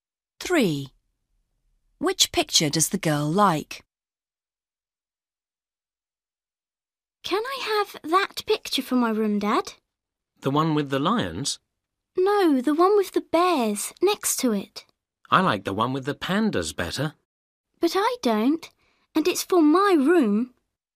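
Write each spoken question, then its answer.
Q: Which picture does the girl like?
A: The one with the bears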